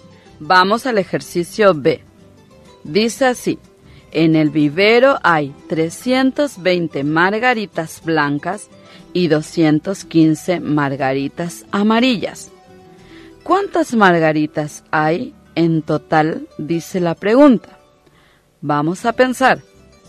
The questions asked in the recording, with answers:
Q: ¿Cuántas margaritas hay en total?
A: Se obtiene la suma o total igual a 535.